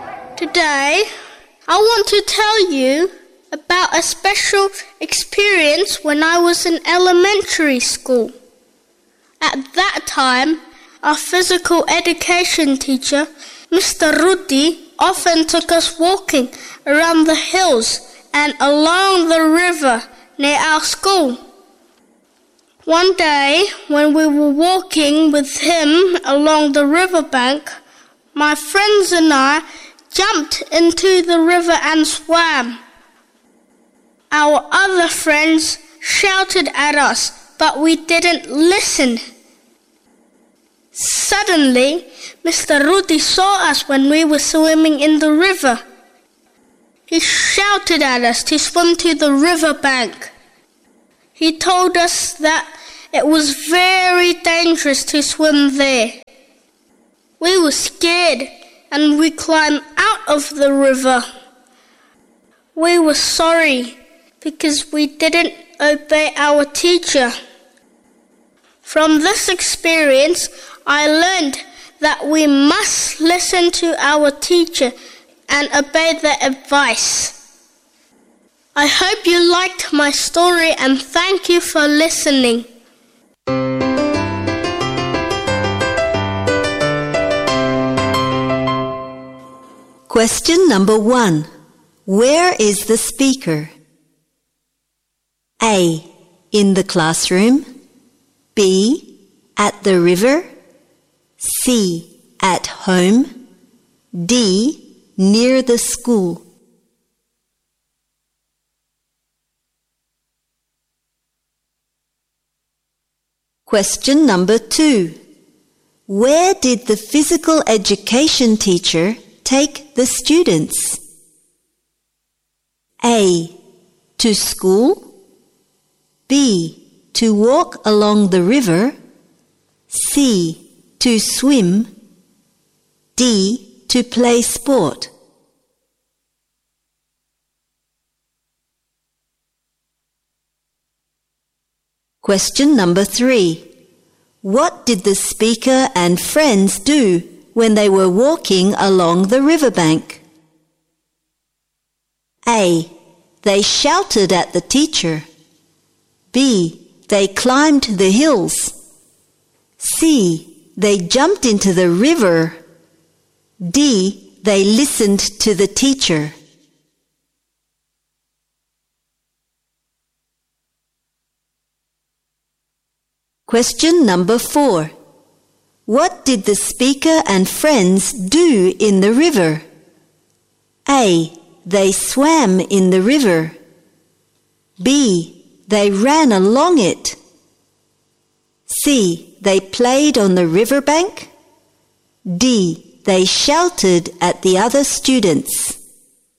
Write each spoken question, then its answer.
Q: Where did the physical education teacher take the students?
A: B. To walk along the river.

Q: What did the speaker and friends do when they were walking along the riverbank?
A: C. They jumped into the river.

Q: What did the speaker and friends do in the river?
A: A. They swam in the river.